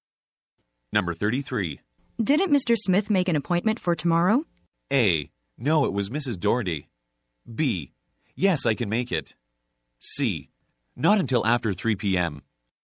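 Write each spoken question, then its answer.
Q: Didn't Mr. Smith make an appointment for tomorrow?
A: A: No, it was Mrs. Doherty.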